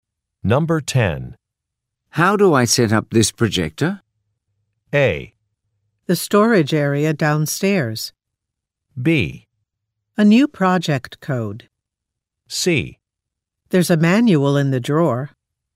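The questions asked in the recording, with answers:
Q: How do I set up this projector?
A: C: There's a manual in the drawer.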